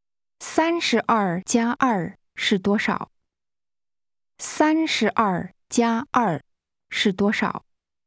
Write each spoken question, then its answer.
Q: 32+2是多少?32+2是多少?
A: 34。34。